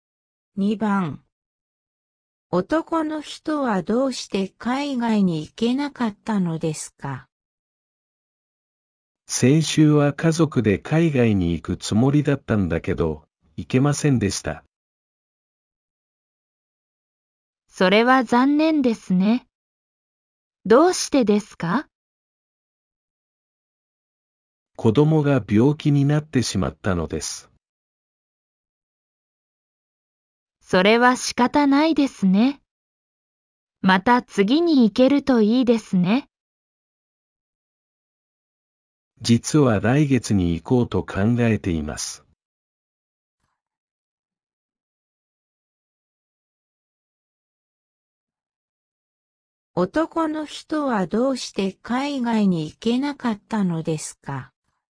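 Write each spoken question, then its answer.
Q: 男の人はどうして海外に行けなかったのですか?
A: 子供が病気になったから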